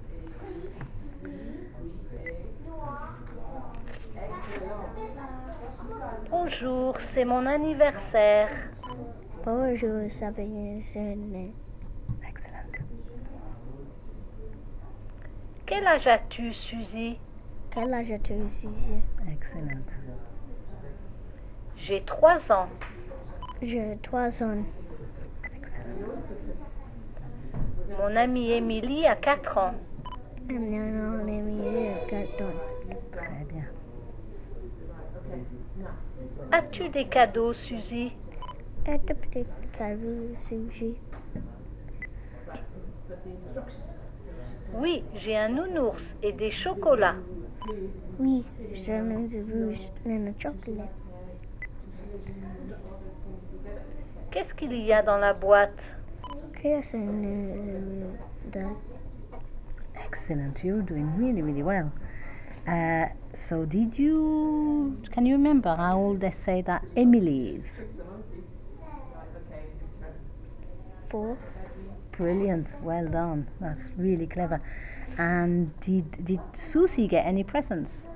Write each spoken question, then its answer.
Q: And did Susie get any presents?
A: Yeah, un nounours et des chocolats.